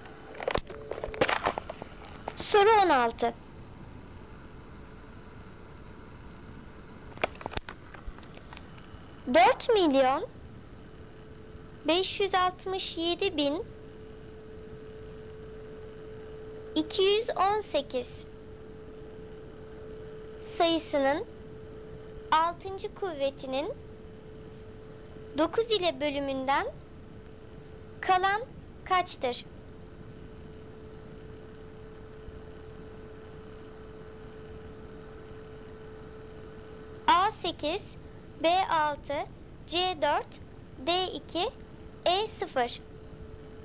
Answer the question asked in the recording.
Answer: Doğru cevap E0.